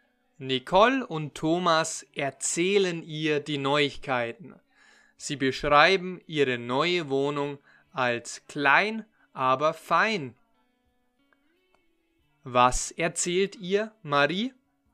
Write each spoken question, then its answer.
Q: Was erzählt ihr Marie?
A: die Neuigkeiten. Nicole und ich erzählen ihr die Neuigkeiten.